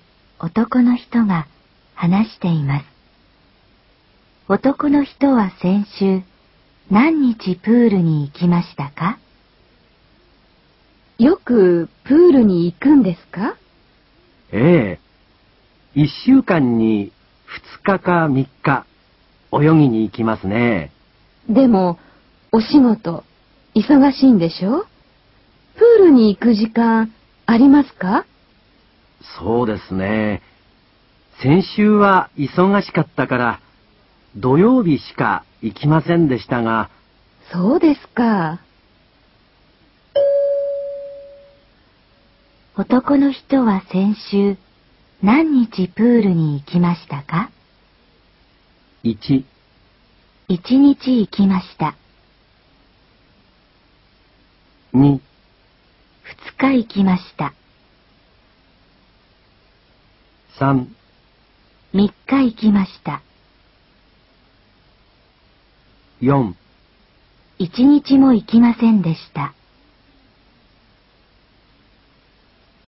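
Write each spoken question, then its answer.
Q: 男の人は先週何日プールに行きましたか?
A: 1: 1日行きました。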